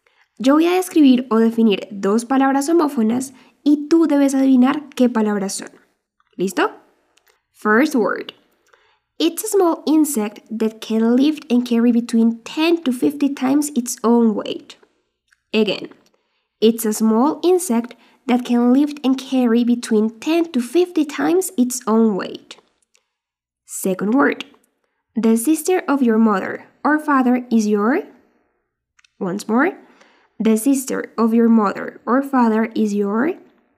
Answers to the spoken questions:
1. La primera palabra es ant.
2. Y la segunda es aunt.